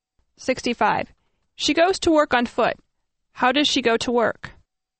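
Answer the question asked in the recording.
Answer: On foot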